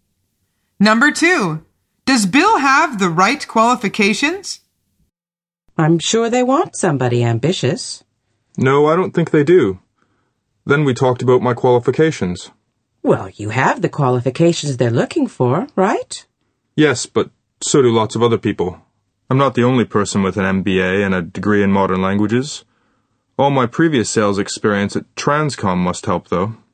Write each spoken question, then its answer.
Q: does Bill have the right qualifications?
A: The answer is yes.